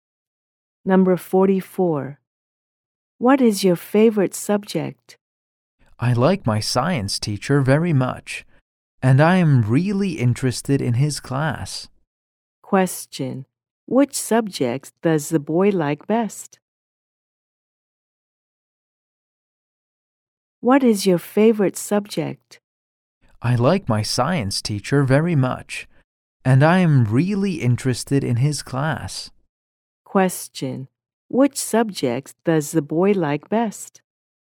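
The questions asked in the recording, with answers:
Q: Which subject does the boy like best?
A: Science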